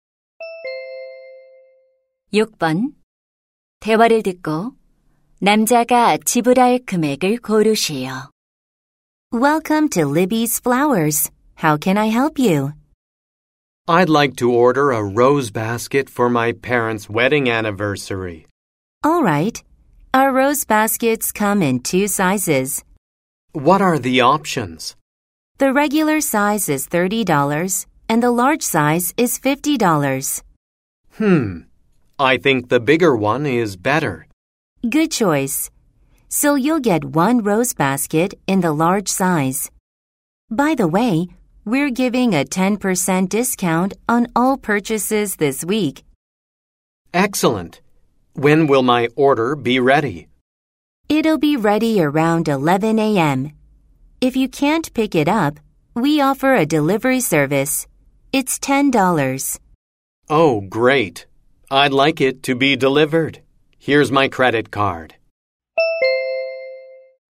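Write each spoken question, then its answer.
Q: 대화를 듣고 남자가 지불할 금액을 고르시오.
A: $55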